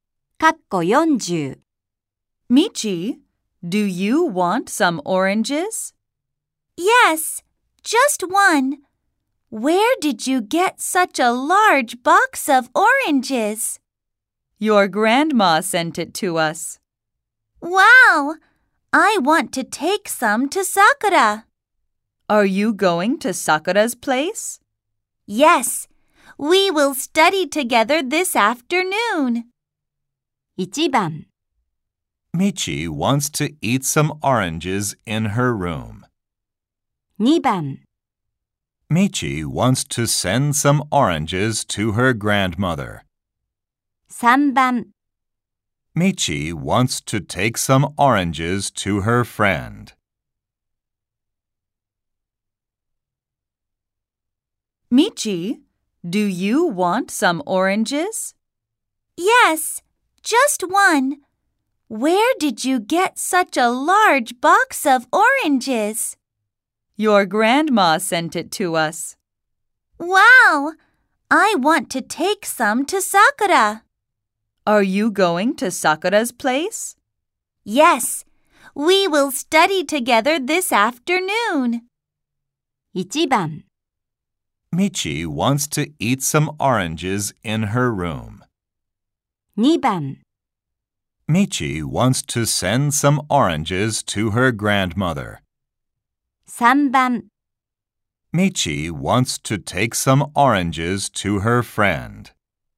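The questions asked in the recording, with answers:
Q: Michi wants to take some oranges to her friend.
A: 3: Michi wants to take some oranges to her friend.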